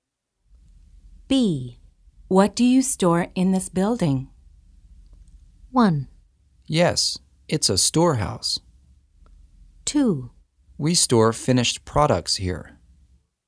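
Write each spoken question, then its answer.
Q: What do you store in this building?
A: 2: We store finished products here.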